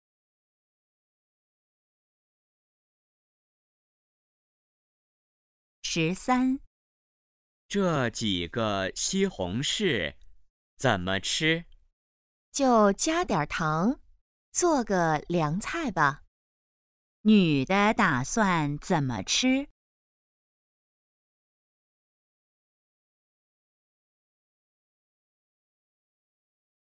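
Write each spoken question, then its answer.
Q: 女的打算怎么吃?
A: 加点糖做凉菜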